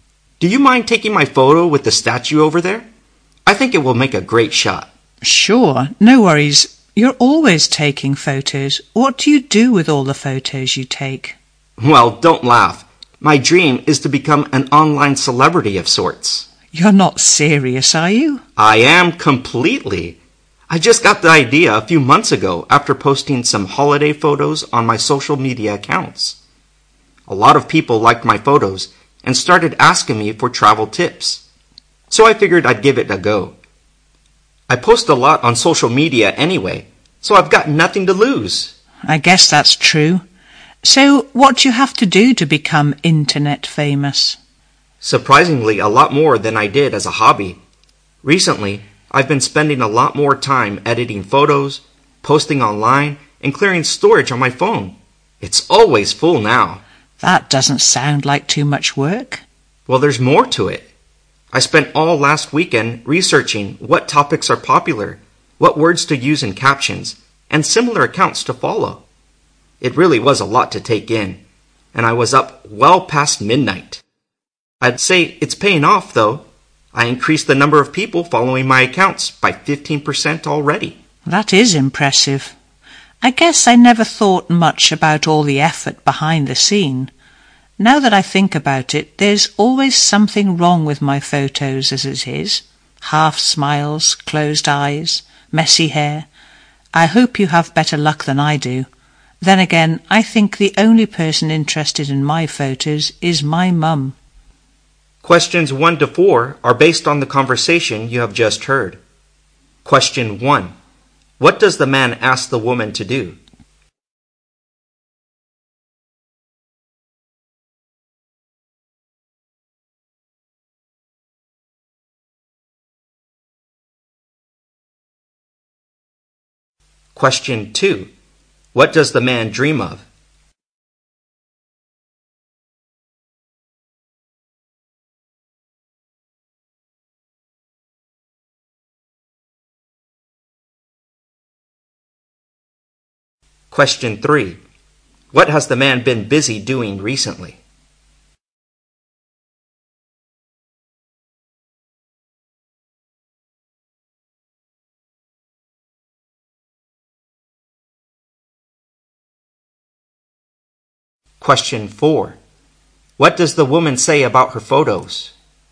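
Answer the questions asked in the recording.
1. Take his photo with the statue
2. Becoming an online celebrity
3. Editing and posting photos online and researching popular topics
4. There is always something wrong with them; only her mum is interested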